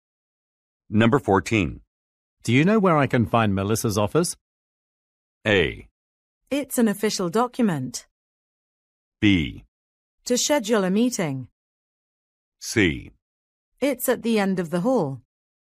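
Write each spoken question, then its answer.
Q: Do you know where I can find Melissa's office?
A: C: It's at the end of the hall.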